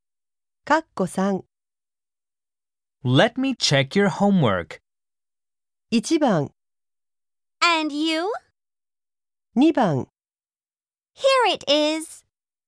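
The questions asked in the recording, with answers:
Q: Let me check your homework.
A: 2: Here it is.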